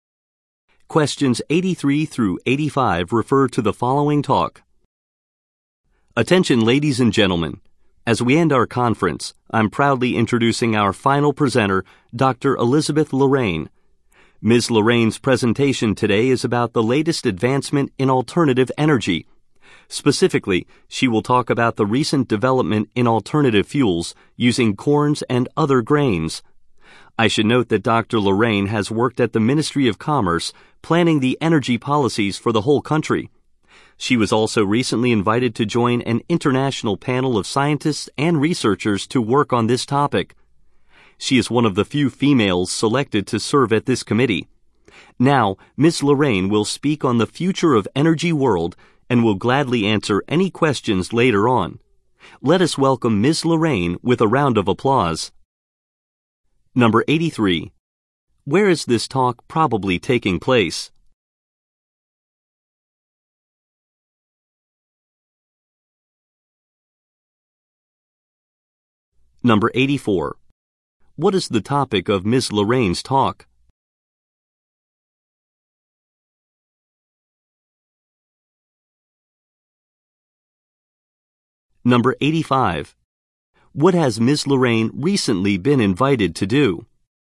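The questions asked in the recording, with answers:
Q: Where is this talk probably taking place?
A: At a conference

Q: What is the topic of Ms.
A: Alternative fuels made from corn and other grains

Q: What has Ms. Lorraine recently been invited to do?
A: Join an international panel of scientists and researchers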